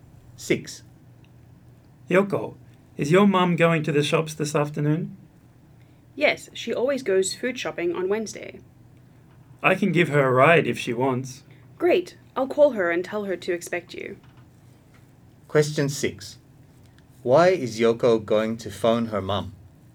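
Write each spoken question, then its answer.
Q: Why is Yoko going to phone her mom?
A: To tell her John will give her a ride to the shops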